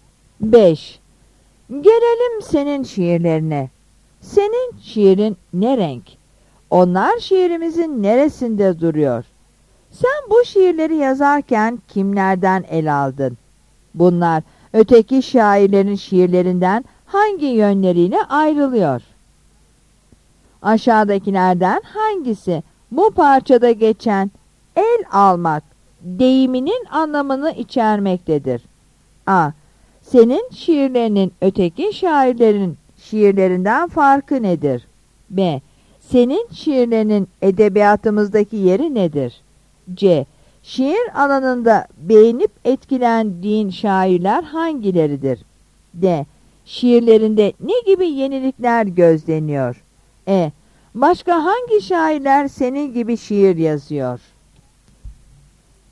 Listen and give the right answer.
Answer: Yanıt C'dir.